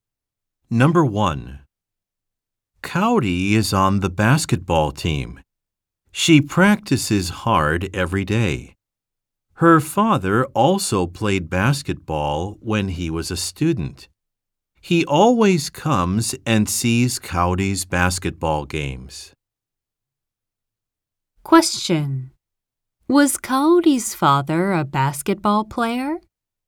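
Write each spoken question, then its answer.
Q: Was Cowdy's father a basketball player?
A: Yes, he was.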